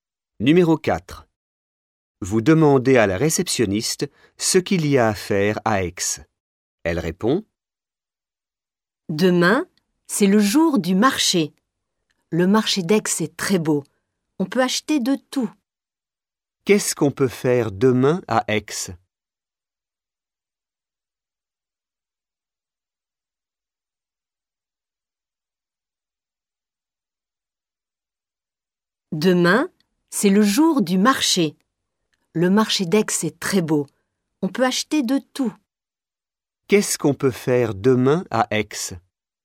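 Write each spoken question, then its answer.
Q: Qu'est-ce qu'on peut faire demain à Aix?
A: Aller au marché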